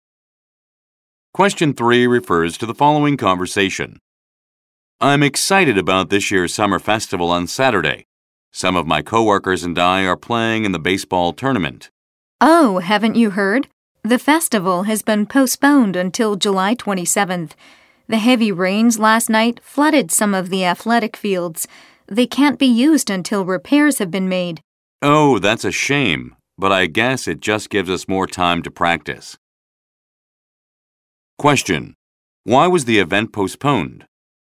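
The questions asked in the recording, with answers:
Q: Why was the event postponed?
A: Heavy rains flooded some of the athletic fields.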